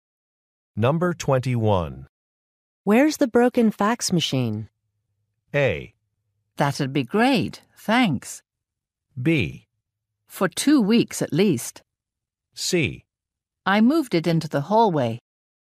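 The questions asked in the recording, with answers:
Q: Where's the broken fax machine?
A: C: I moved it into the hallway.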